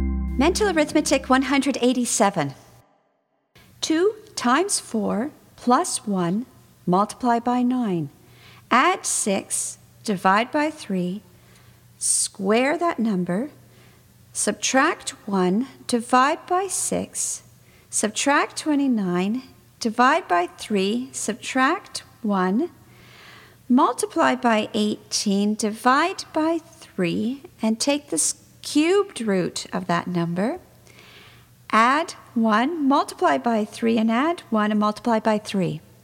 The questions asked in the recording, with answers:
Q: 2 times 4 plus 1 multiply by 9. Add 6, divide by 3, square that number, subtract 1, divide by 6, subtract 29, divide by 3, subtract 1, multiply by 18, divide by 3, and take the cubed root of that number. Add 1, multiply by 3, and add 1, and multiply by 3.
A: And the answer is 66.